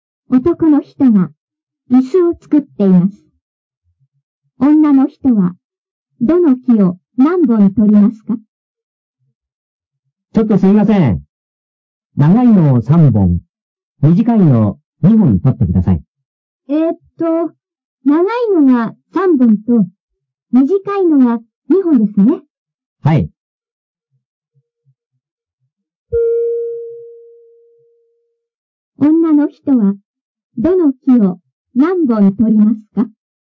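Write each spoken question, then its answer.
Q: 女の人はどの木を何本取りますか?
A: 長いのを3本と短いのを2本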